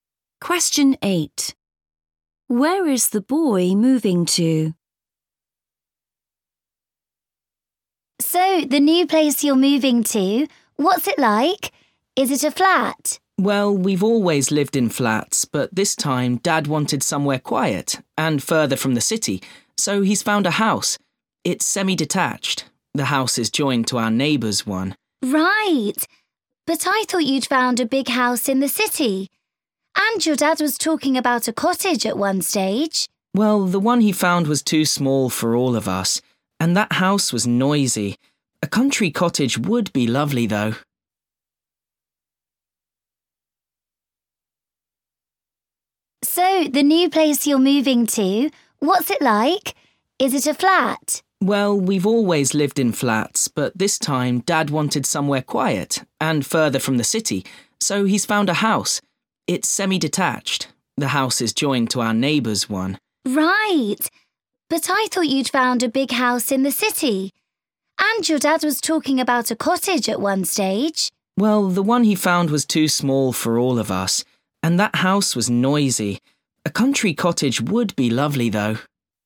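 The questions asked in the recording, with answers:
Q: Where is the boy moving to?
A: a semi-detached house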